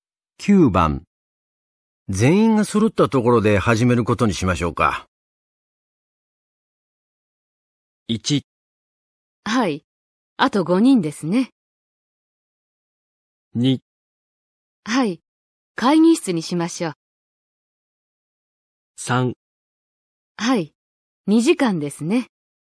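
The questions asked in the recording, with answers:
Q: 全員が揃ったところで始めることにしましょうか。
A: 1: はい、あと5人ですね。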